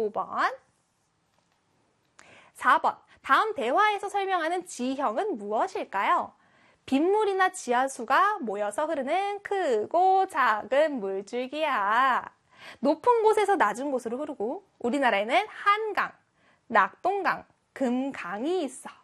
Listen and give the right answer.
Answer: 그렇죠. 하천이 되겠죠. 4번에 하천입니다.